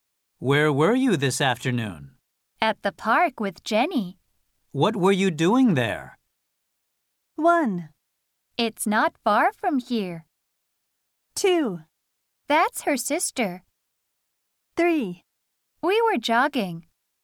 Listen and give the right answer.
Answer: The correct answer is the last one.